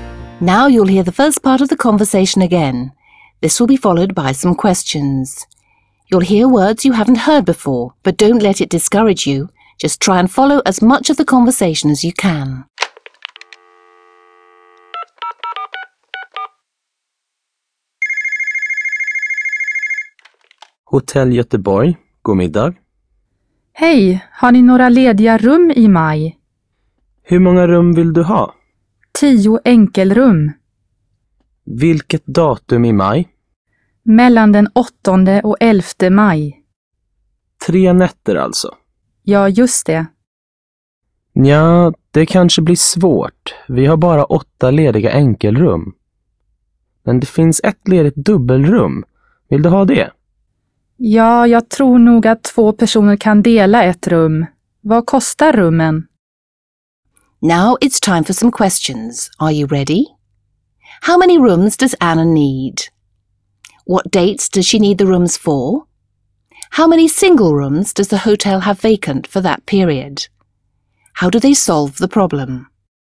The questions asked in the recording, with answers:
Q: How many rooms does Anna need?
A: Anna would like to book 10 single rooms.

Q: What dates does she need the rooms for?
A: Anna needs the rooms from the 8th to the 11th of May.